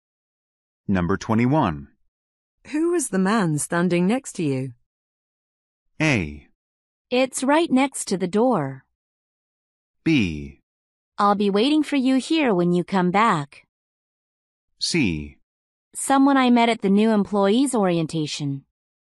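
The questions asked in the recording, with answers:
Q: Who was the man standing next to you?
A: C: Someone I met at the new employees' orientation.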